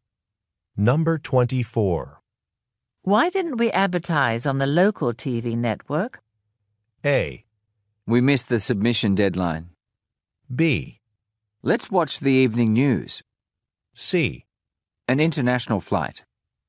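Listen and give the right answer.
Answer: A: We missed the submission deadline.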